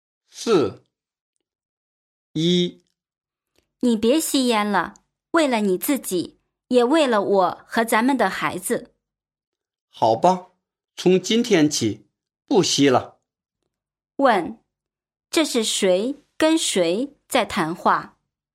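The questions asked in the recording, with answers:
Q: 问,这是谁跟谁在谈话?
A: 夫妻(丈夫和妻子)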